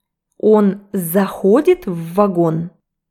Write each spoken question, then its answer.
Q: Он заходит в вагон?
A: Нет, он выходит из него.